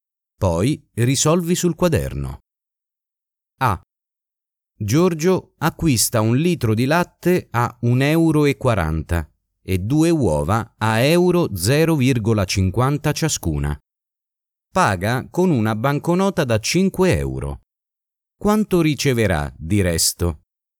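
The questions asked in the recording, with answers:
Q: Quanto riceverà di resto?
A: 2,60 €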